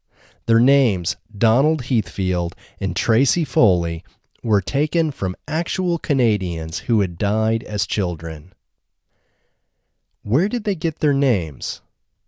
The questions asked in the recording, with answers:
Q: Where did they get their names?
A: They got their names from Canadians who had died as children.